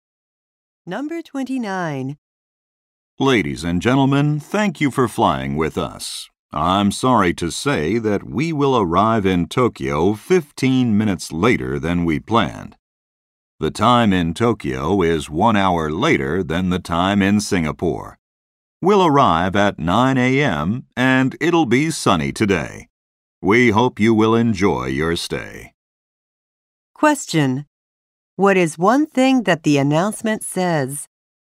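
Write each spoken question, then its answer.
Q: What is one thing that the announcement says?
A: The plane will arrive in Tokyo 15 minutes late.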